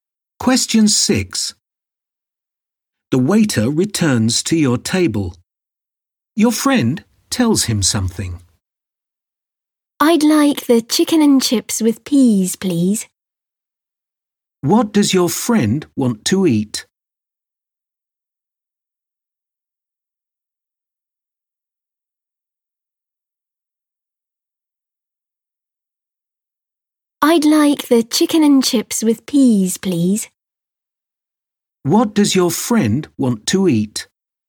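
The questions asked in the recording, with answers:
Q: What does your friend want to eat?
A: Chicken and chips with peas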